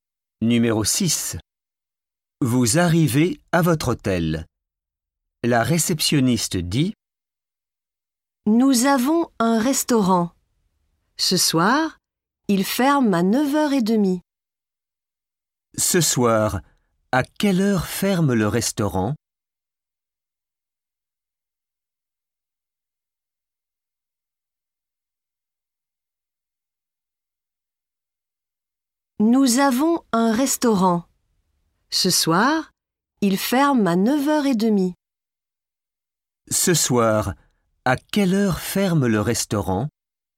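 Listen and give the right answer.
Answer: À 9h30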